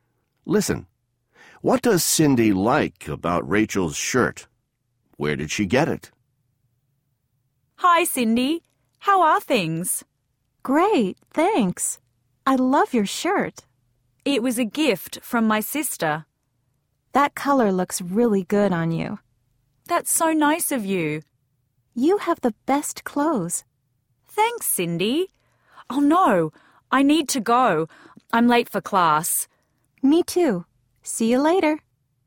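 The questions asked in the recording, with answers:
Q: What does Cindy like about Rachel's shirt?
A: The color looks really good on her

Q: Where did she get it?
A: It was a gift from her sister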